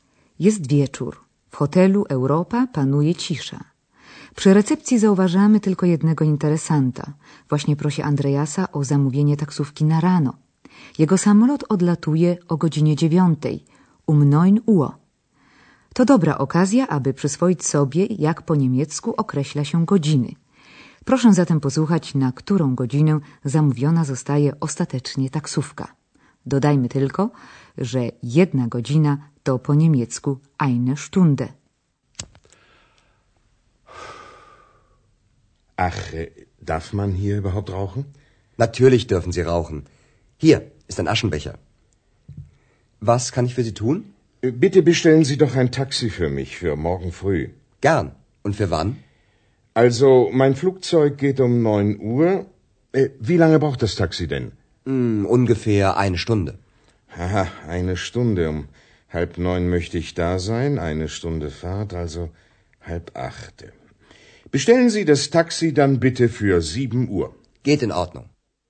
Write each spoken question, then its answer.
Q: Proszę zatem posłuchać, na którą godzinę zamówiona zostaje ostatecznie taksówka.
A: Gość zdecydował zatem, że taksówka powinna przyjechać o godzinie siódmej rano.